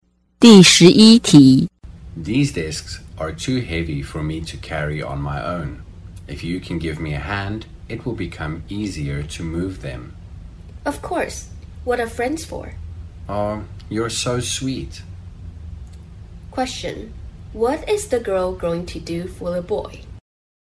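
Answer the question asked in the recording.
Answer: Help him carry the heavy discs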